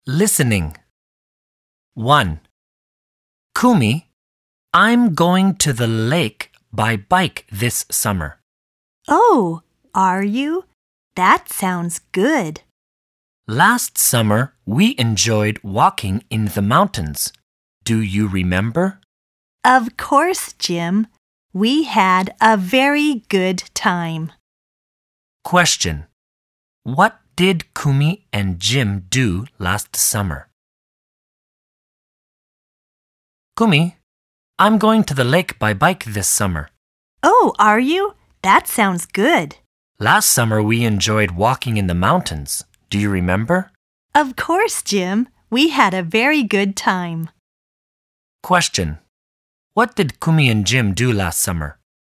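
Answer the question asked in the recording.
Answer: They walked in the mountains.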